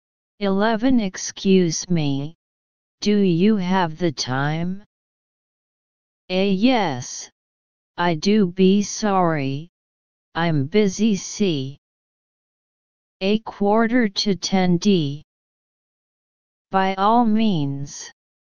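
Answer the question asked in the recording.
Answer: C: A quarter to 10.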